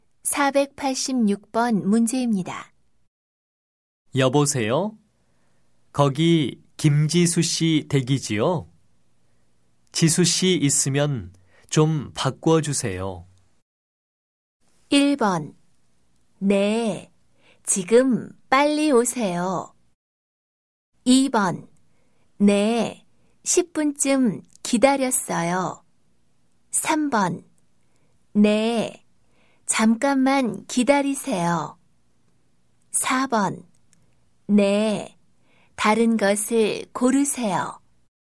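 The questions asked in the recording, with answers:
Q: 여보세요? 거기 김지수 씨 댁이지요? 지수 씨 있으면 좀 바꿔주세요.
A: 3: 네, 잠깐만 기다리세요.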